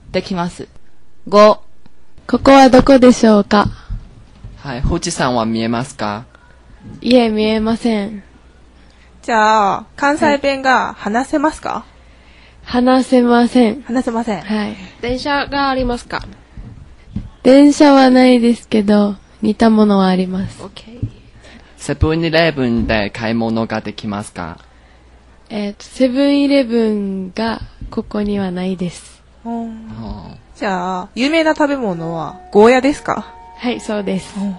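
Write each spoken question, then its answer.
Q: ここはどこでしょうか?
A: 沖縄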